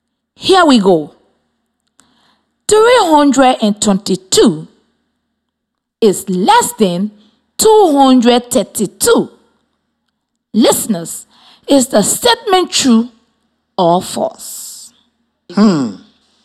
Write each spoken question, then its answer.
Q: Listeners, is the statement true or false?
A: It is false.